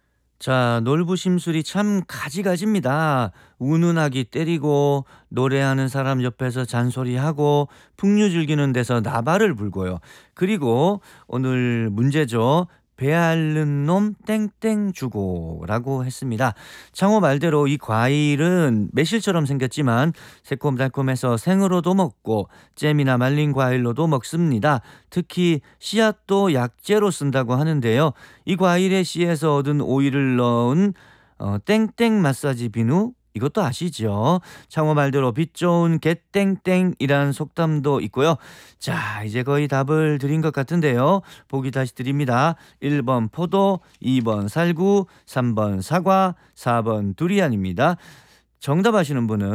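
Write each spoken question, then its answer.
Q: 배앓는 놈 땡땡 주고라고 했습니다.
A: 2: 살구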